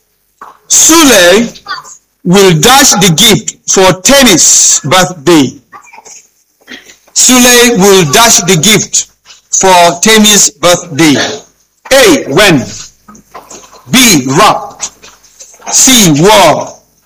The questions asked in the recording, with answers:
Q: Sule will dash the gift for Tennis birthday.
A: B. Wrapped.